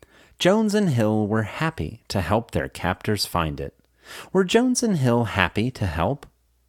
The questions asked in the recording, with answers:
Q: Were Jones and Hill happy to help?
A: Yes, Jones and Hill were happy to help.